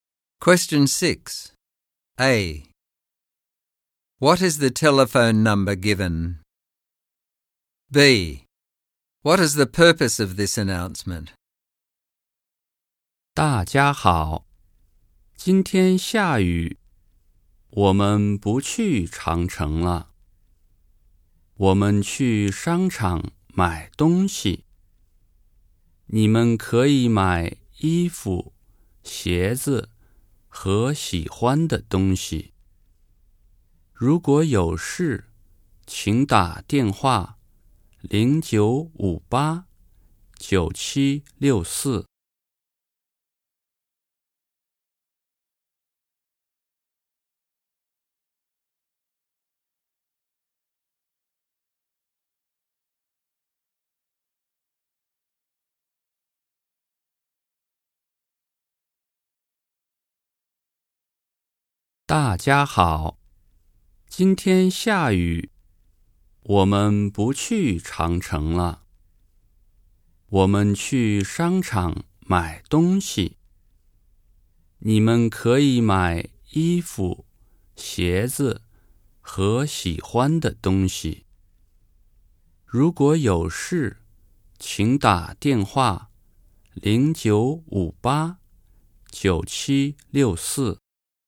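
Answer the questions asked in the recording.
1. 0958-9764
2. It is raining, so the trip to the Great Wall is cancelled and the group will go shopping at a mall instead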